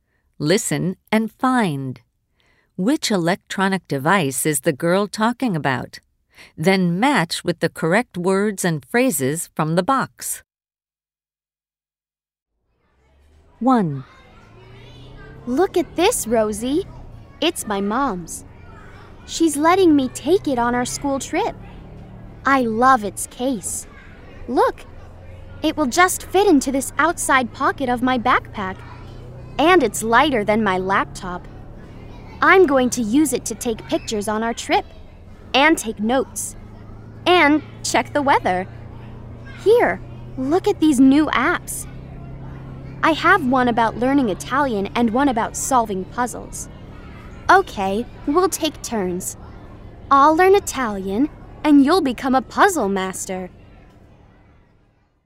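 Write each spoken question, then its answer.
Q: Which electronic device is the girl talking about?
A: a tablet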